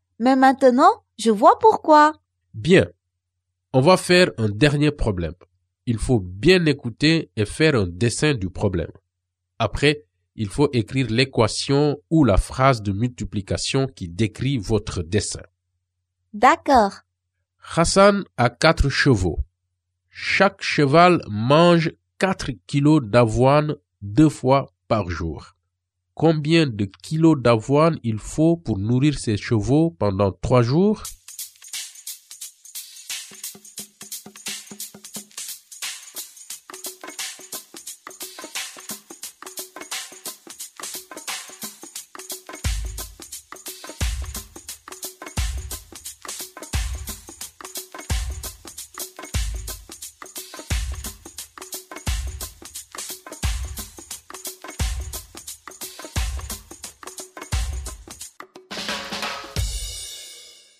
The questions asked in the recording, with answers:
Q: Combien de kilos d'avoine il faut pour nourrir ses chevaux pendant 3 jours?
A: Donc Hassan doit avoir 96 kilos d'avoine pour nourrir ses chevaux pendant 3 jours.